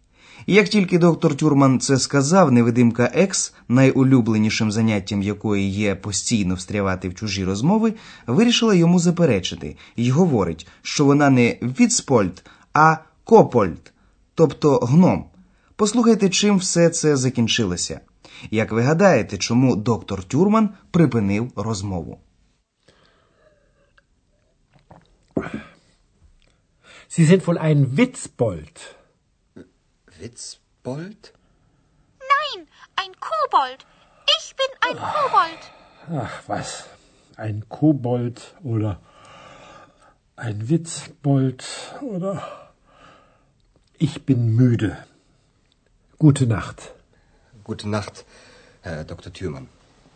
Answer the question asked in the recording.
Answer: Отож, доктор Тюрман припинив розмову, оскільки він був müde, втомлений.